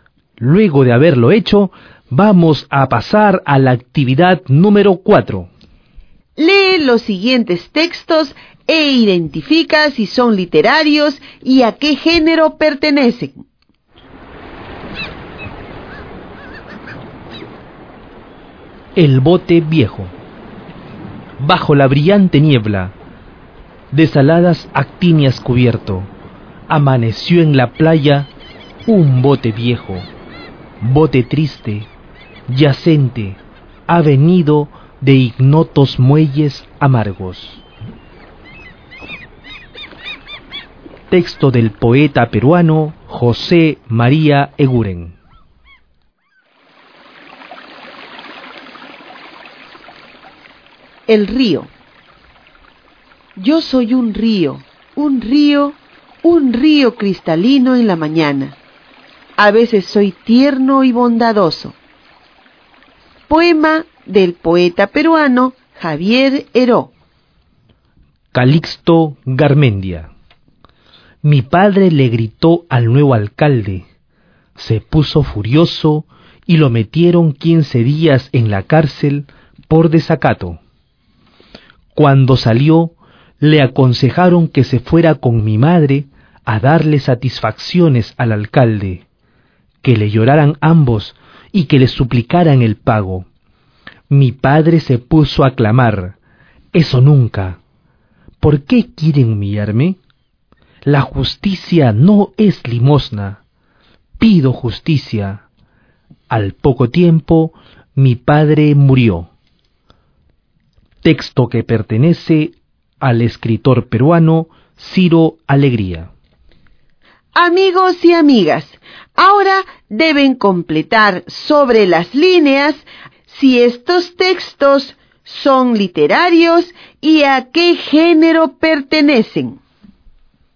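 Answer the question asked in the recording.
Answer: El bote viejo: literario, lírico; El río: literario, lírico; Calixto Garmendia: literario, narrativo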